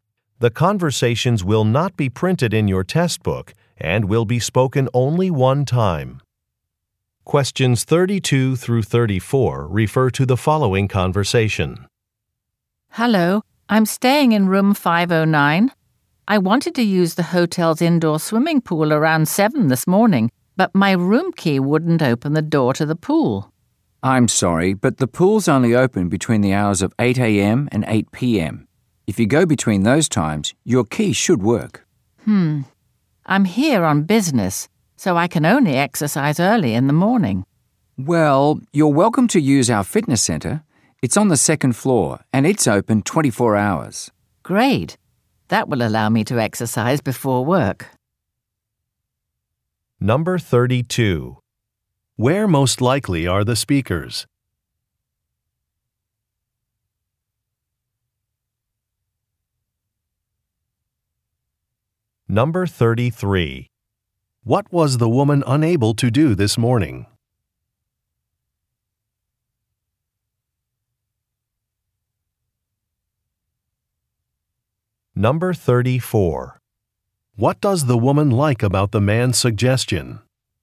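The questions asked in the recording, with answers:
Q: Where most likely are the speakers?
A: At a hotel

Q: What was the woman unable to do this morning?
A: Open the door to the swimming pool

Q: What does the woman like about the man's suggestion?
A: She can exercise before work (fitness center open 24 hours)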